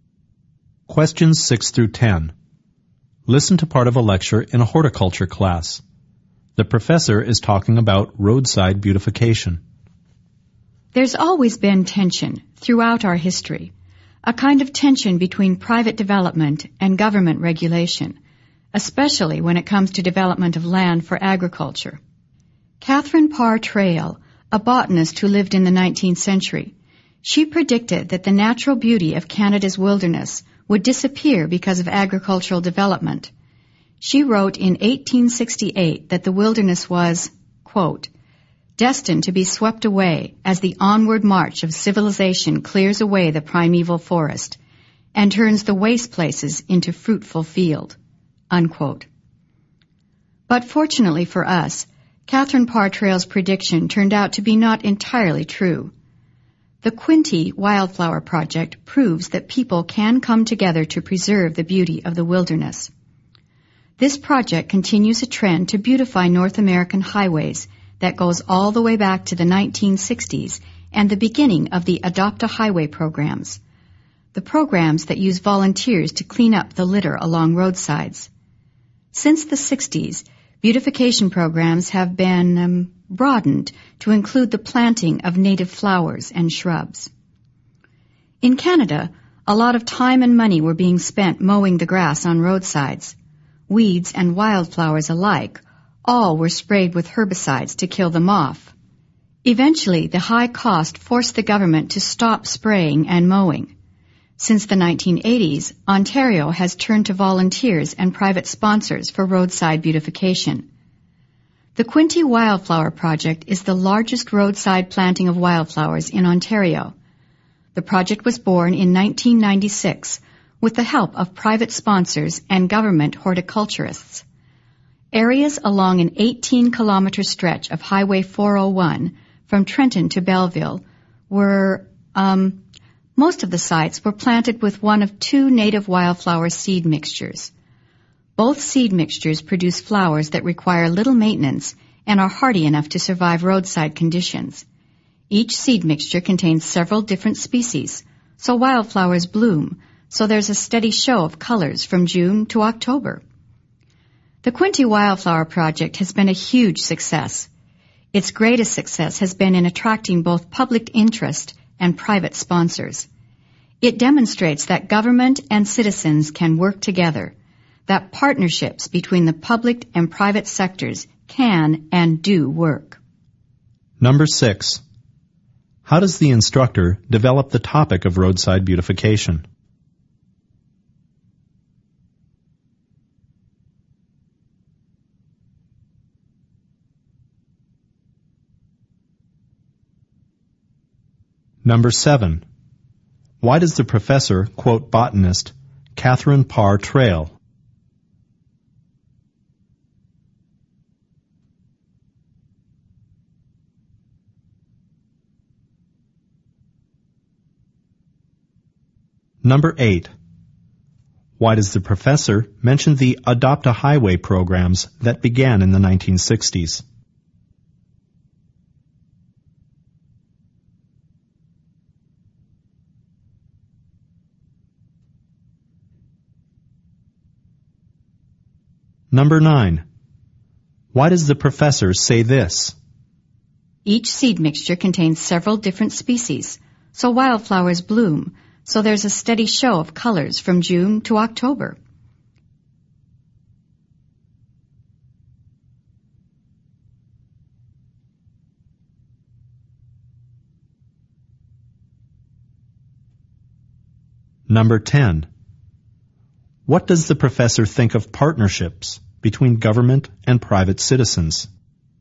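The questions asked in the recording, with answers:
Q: Why does the professor quote botanist Catherine Parr Traill?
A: To present a prediction that the wilderness would disappear, which turned out not to be entirely true

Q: Why does the professor mention the Adopt-a-Highway programs that began in the 1960s?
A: To show that the Quinte Wildflower Project continues a long trend of beautifying highways

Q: What does the professor think of partnerships between government and private citizens?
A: They can and do work; the project shows they are successful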